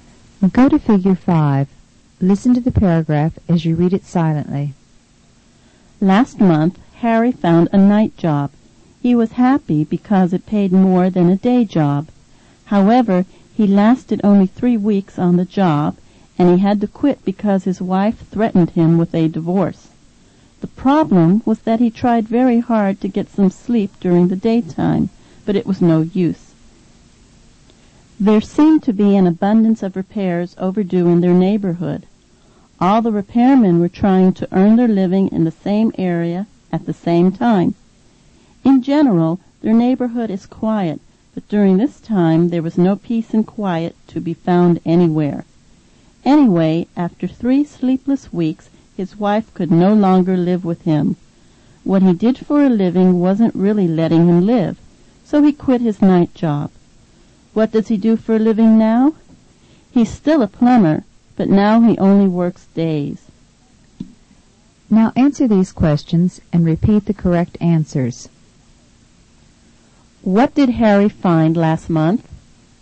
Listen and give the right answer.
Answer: Repeat, he found a night job.